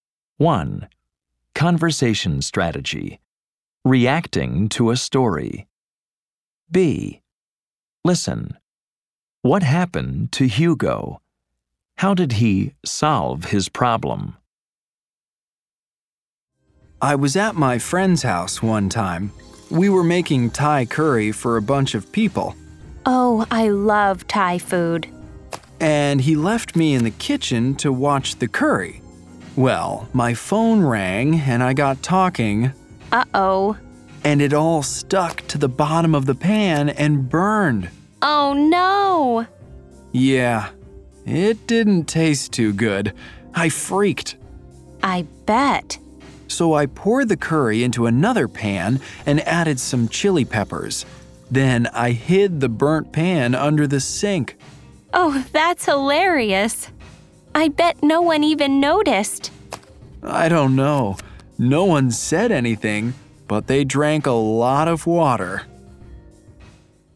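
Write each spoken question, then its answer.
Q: What happened to Hugo?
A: He was talking on the phone and the curry burned.

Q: How did he solve his problem?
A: He poured the curry into another pan, added chili peppers, and hid the burnt pan under the sink.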